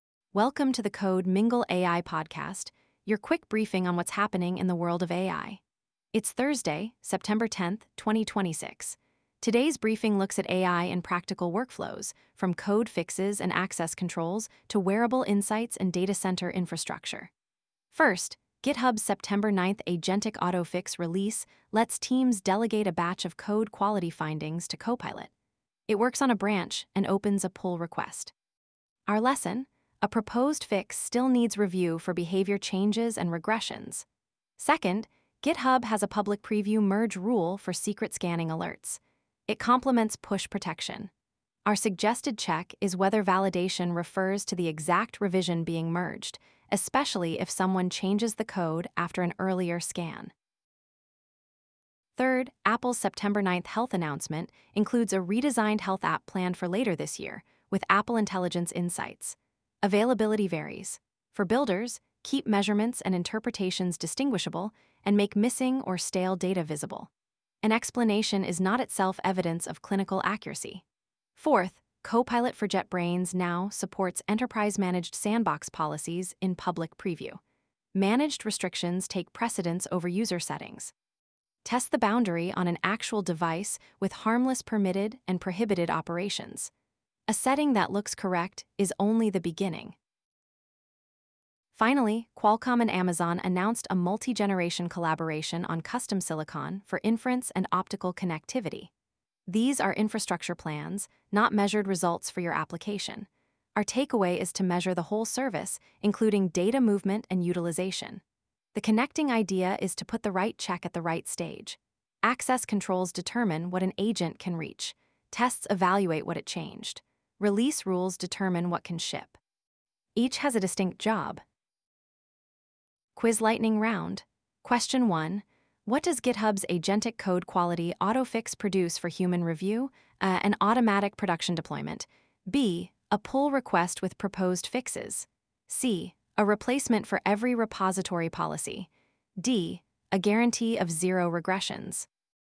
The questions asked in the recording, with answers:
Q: What does GitHub's agentic code quality autofix produce for human review?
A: The answer is B.